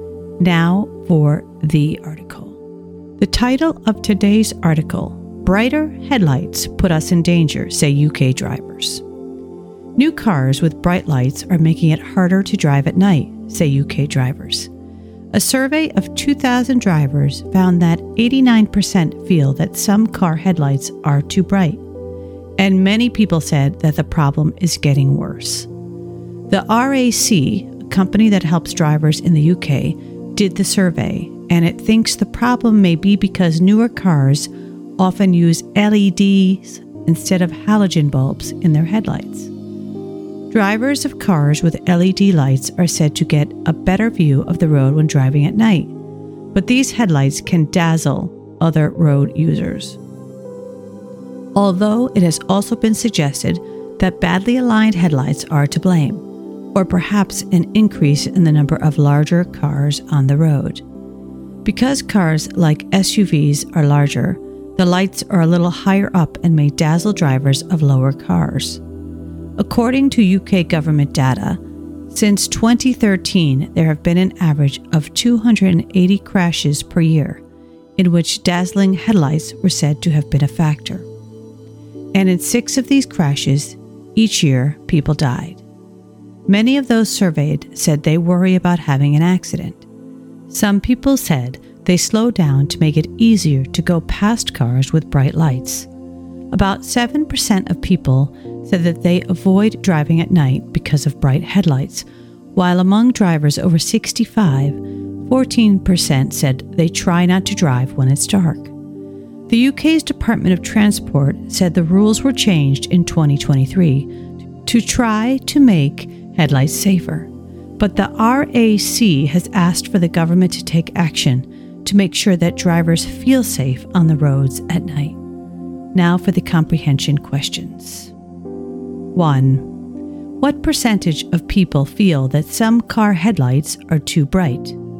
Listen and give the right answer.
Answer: Answer, 89%.